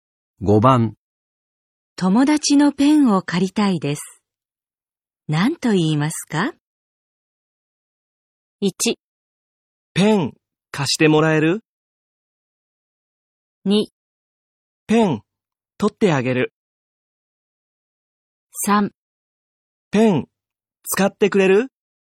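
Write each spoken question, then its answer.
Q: 友達のペンを借りたいです。何と言いますか?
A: 1: ペン貸してもらえる?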